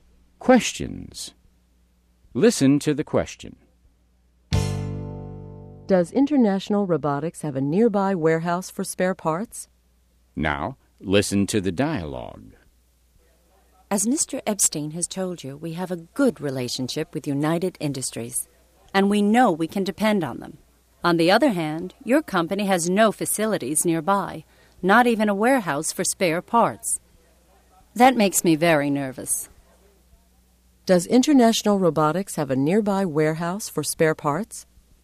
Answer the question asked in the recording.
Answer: Mr. Blake's company has no facilities nearby, not even a warehouse for spare parts.